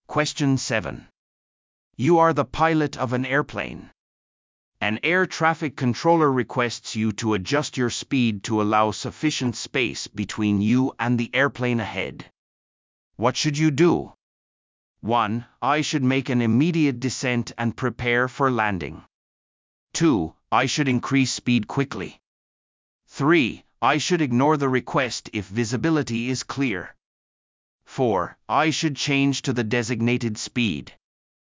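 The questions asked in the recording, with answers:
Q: What should you do?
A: 4: I should change to the designated speed.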